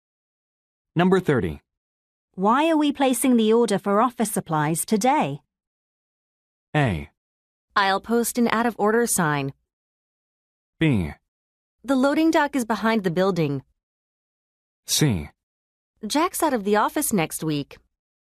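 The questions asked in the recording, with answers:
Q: Why are we placing the order for office supplies today?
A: C: Jack's out of the office next week.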